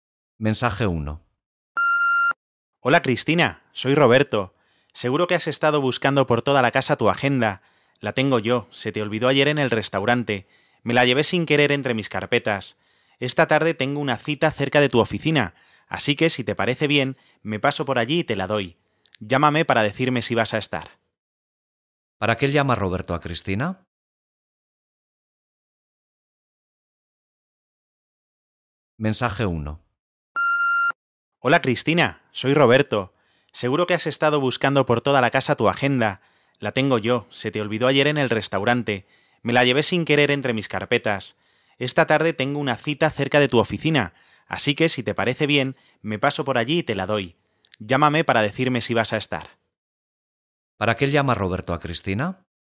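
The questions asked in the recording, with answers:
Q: ¿Para qué llama Roberto a Cristina?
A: Para devolverle la agenda que se dejó en el restaurante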